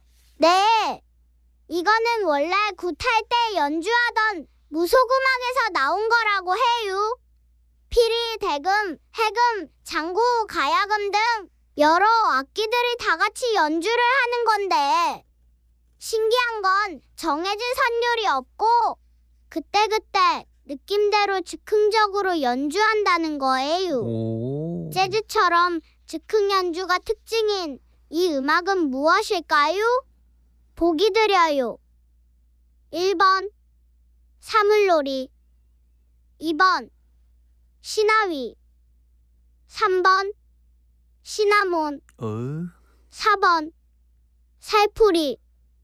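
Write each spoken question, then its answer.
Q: 재즈처럼 즉흥 연주가 특징인 이 음악은 무엇일까요?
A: 2번: 시나위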